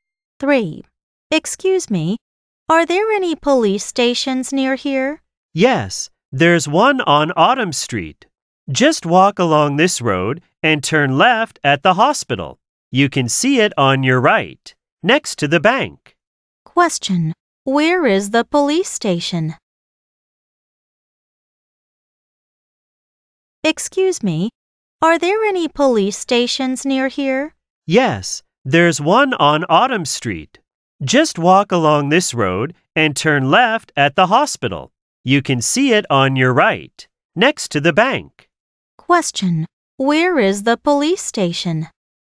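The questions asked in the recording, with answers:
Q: Where is the police station?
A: On Autumn Street, next to the bank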